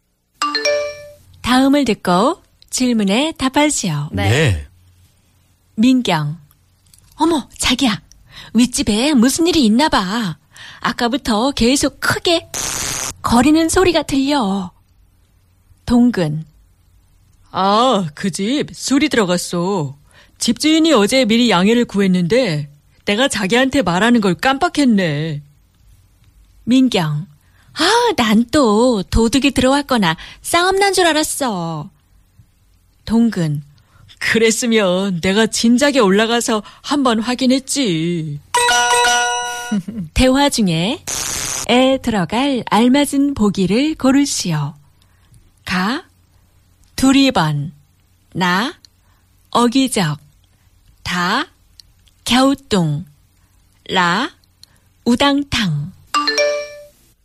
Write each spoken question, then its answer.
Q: 대화 중에 에 들어갈 알맞은 보기를 고르시오.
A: 라 우당탕.